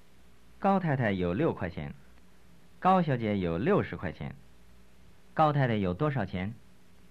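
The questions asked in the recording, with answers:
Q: 高太太有多少钱?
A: 6块钱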